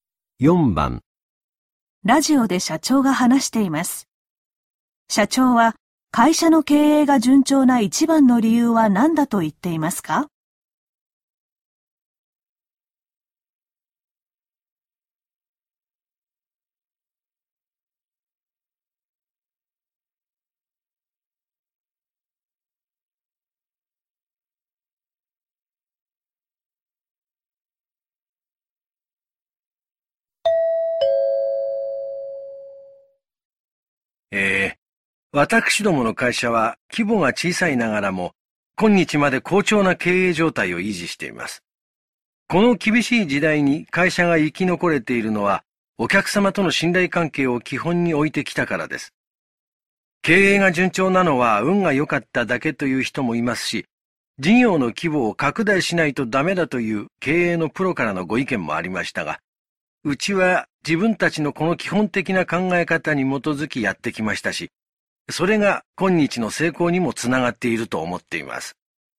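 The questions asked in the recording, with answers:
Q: 社長は会社の経営が順調な一番の理由は何だと言っていますか?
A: お客様との信頼関係を基本に置いてきたから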